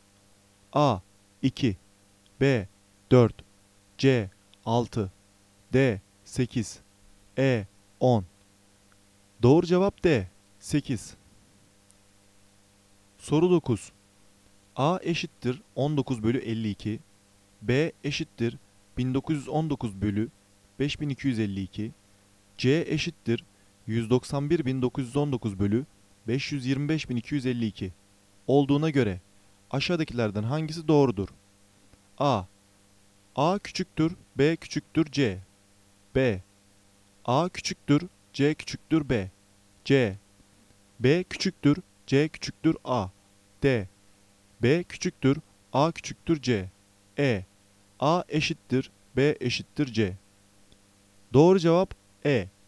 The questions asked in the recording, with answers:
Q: A eşittir 19 bölü 52 B eşittir 1919 bölü 5252 C eşittir 191.919 bölü 525.252 olduğuna göre aşağıdakilerden hangisi doğrudur?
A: Doğru cevap E.